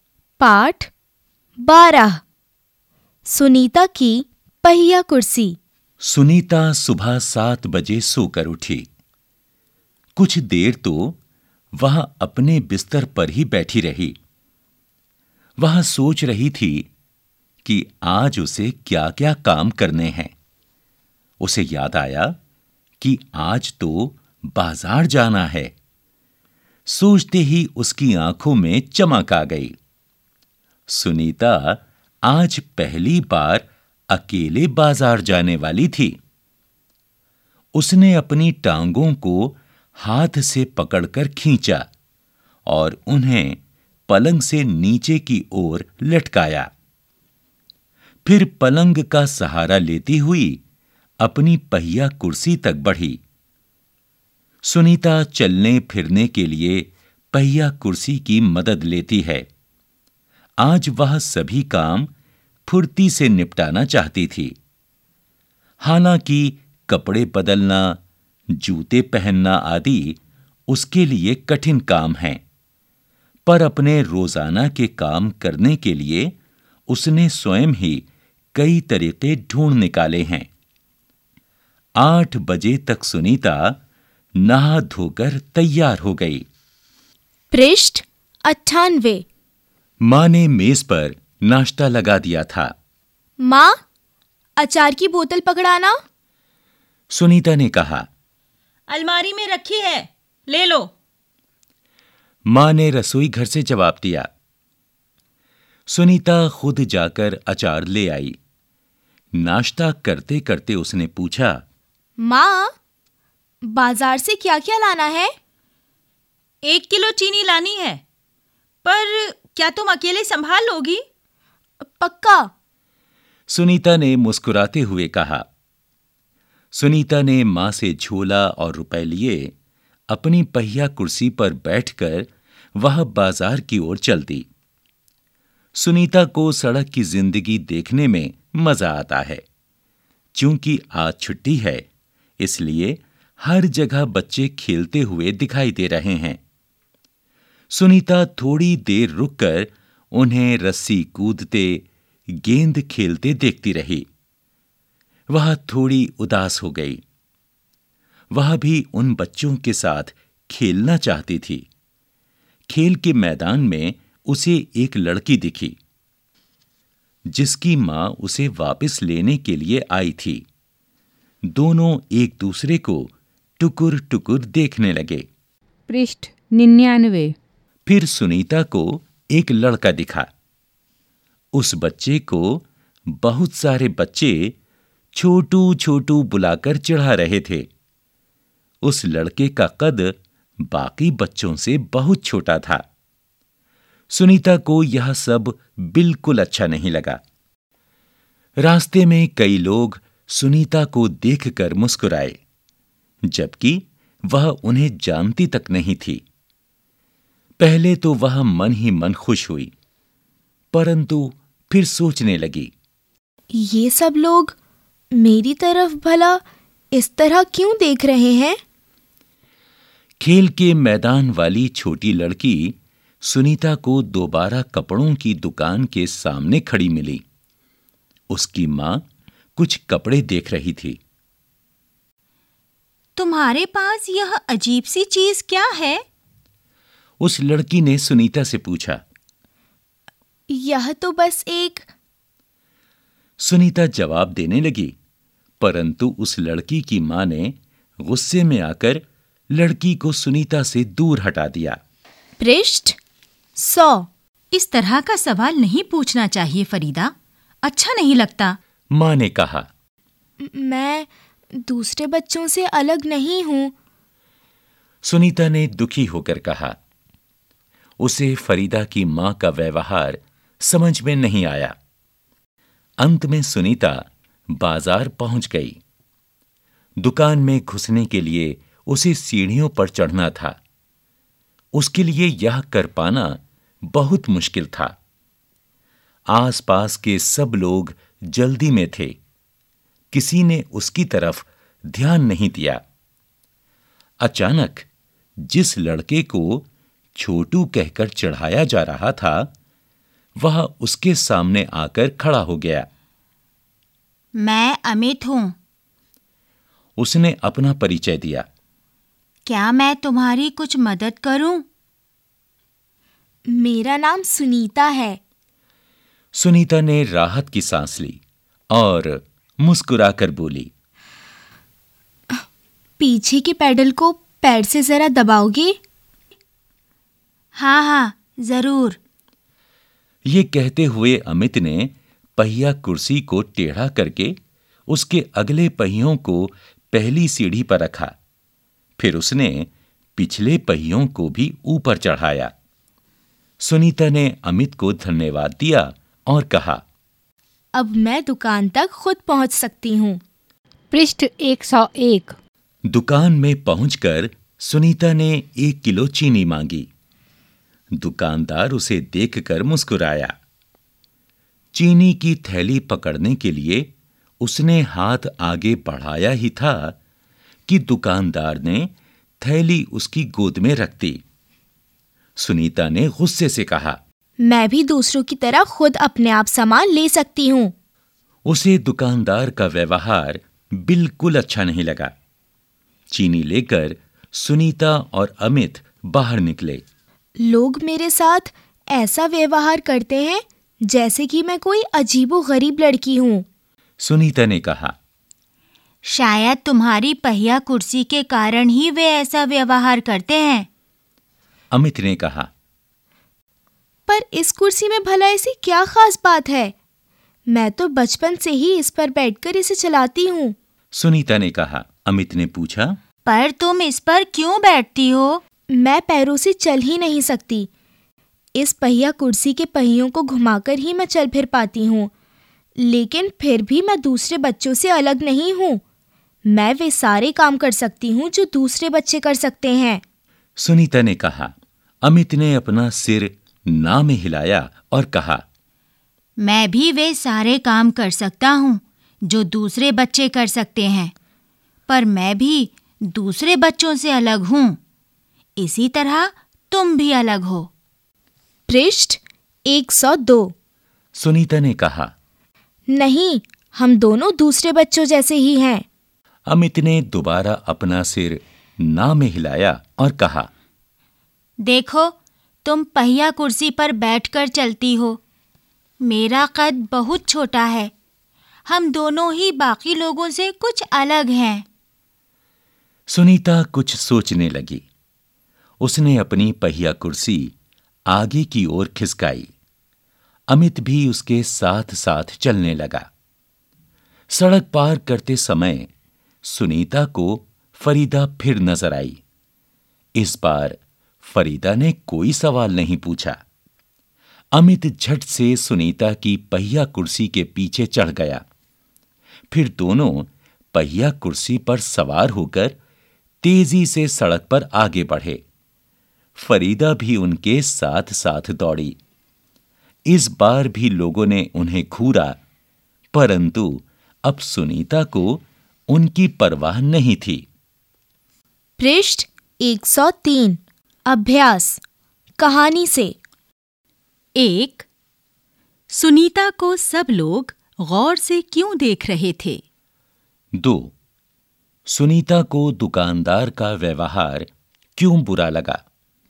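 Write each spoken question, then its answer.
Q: सुनीता को सब लोग गौर से क्यों देख रहे थे?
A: क्योंकि वह पहिया कुर्सी पर बैठकर चलती थी

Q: सुनीता को दुकानदार का व्यवहार क्यों बुरा लगा?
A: दुकानदार ने चीनी की थैली उसकी गोद में रख दी, जबकि वह दूसरों की तरह खुद सामान ले सकती थी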